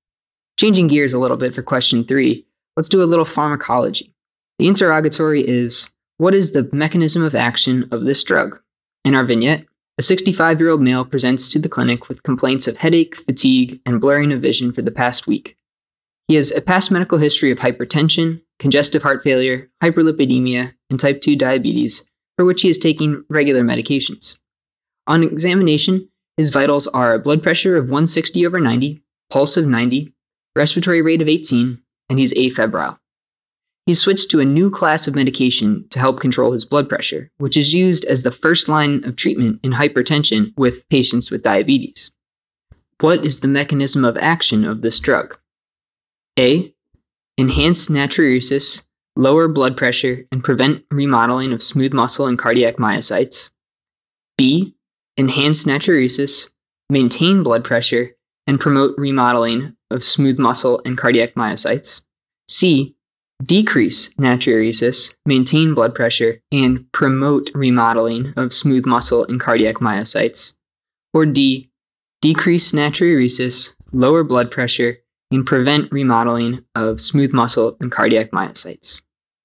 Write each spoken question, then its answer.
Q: What is the mechanism of action of this drug?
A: And the correct answer here is A.